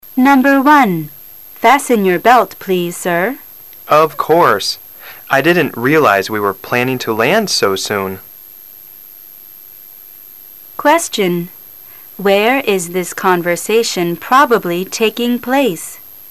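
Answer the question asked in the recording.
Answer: On a plane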